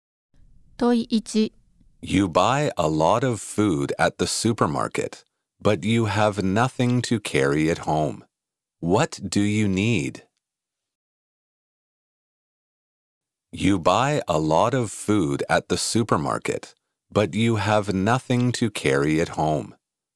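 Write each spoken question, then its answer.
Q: What do you need?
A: A bag to carry the food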